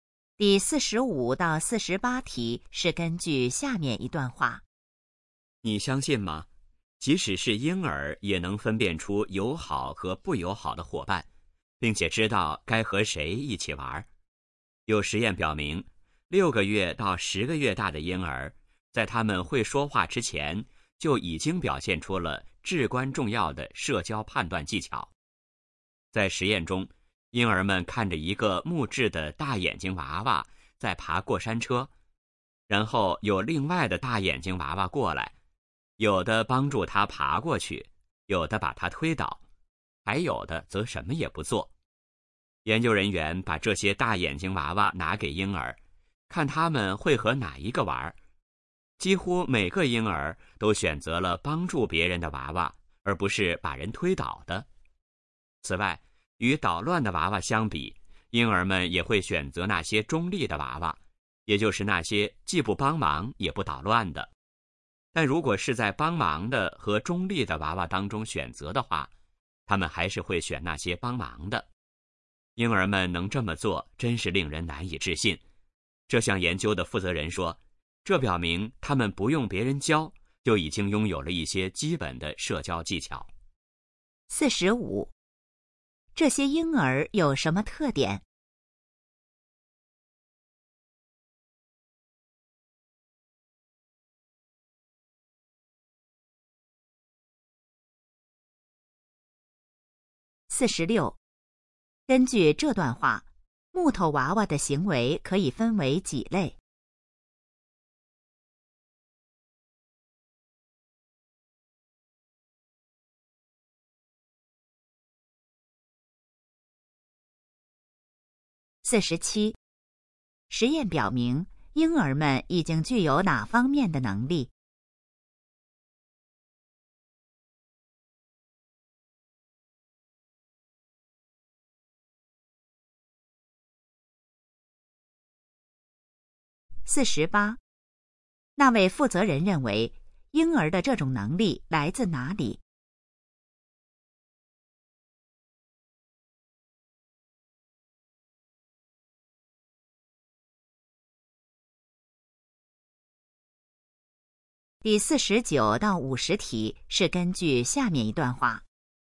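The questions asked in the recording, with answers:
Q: 根据这段话,木头娃娃的行为可以分为几类?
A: 三类

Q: 实验表明,婴儿们已经具有哪方面的能力?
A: 社交判断能力

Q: 那位负责人认为,婴儿的这种能力来自哪里?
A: 天生的,不用别人教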